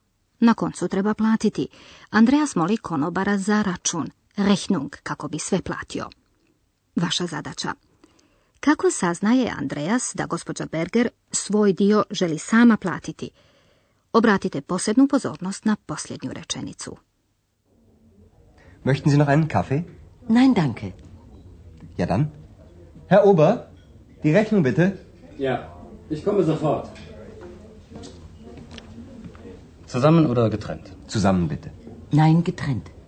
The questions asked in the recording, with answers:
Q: Kako saznaje Andreas da gospođa Berger svoj dio želi sama platiti?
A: Tu gospođa Berger kaže da želi sama platiti.